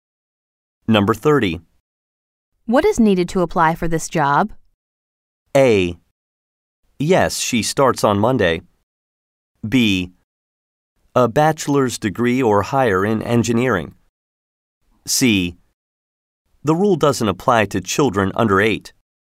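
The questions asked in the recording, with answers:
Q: What is needed to apply for this job?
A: B: A bachelor's degree or higher in engineering.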